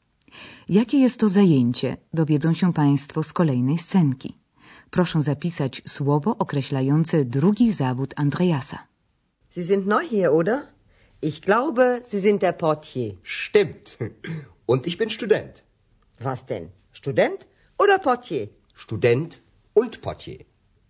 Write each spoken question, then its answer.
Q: Proszę zapisać słowo określające drugi zawód Andreasa.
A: portier, portier, recepcjonista